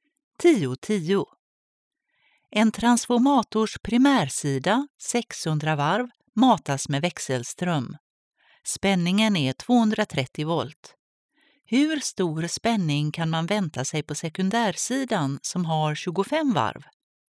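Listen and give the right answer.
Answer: ca 9,6 volt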